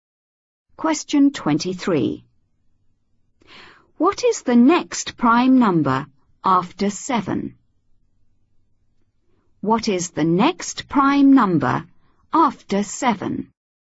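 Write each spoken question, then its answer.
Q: What is the next prime number after 7?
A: 11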